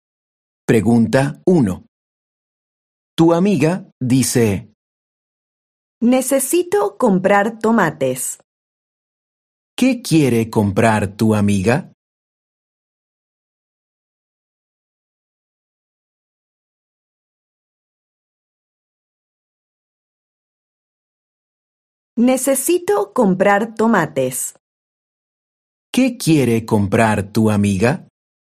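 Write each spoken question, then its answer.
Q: ¿Qué quiere comprar tu amiga?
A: tomates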